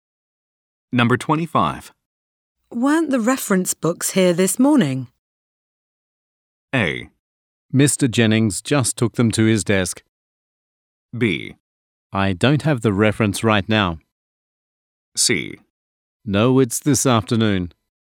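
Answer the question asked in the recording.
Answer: A: Mr. Jennings just took them to his desk.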